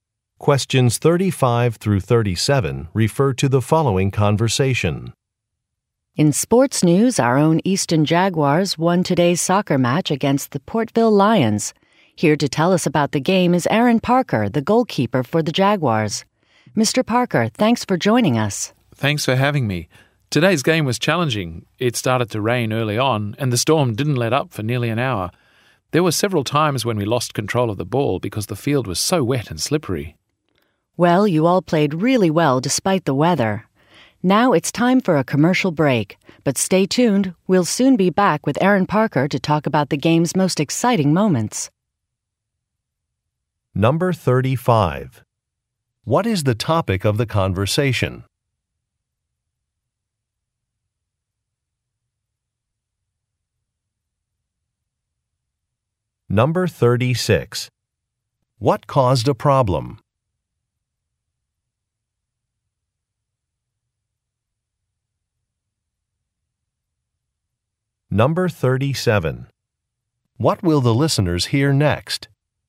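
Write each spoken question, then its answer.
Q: What is the topic of the conversation?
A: A soccer match

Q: What caused a problem?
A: Rain made the field wet and slippery

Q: What will the listeners hear next?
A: A commercial break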